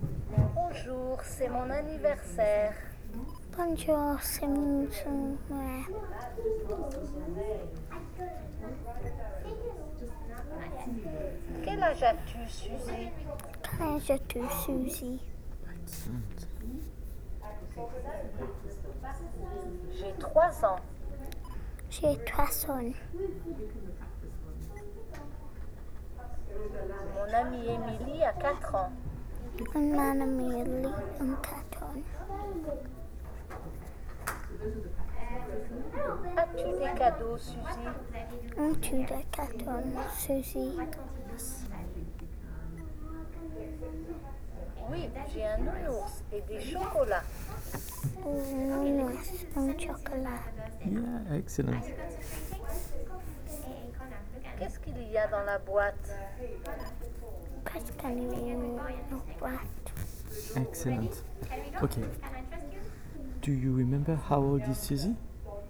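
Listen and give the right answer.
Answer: 3 years old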